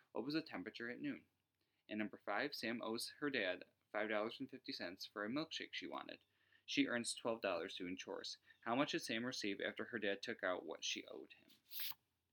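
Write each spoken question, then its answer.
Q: How much did Sam receive after her dad took out what she owed him?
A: $6.50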